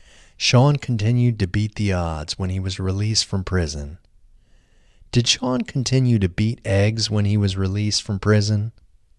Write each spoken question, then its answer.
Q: Did Sean continue to beat eggs when he was released from prison?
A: No, Sean didn't continue to beat eggs when he was released from prison.